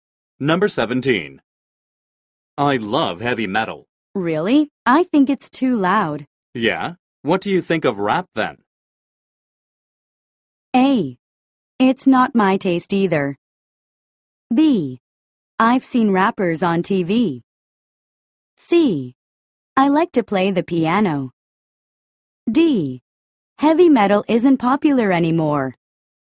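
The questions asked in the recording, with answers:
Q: Yeah? What do you think of rap then?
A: A: It's not my taste either.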